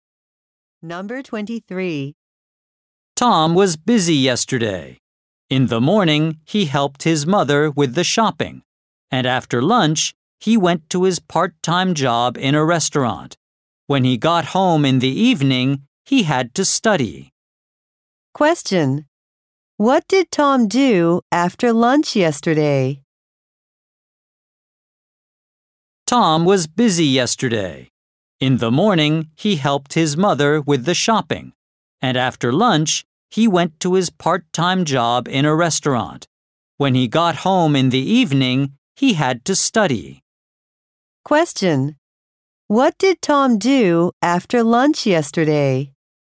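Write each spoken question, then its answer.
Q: What did Tom do after lunch yesterday?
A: He went to his part-time job in a restaurant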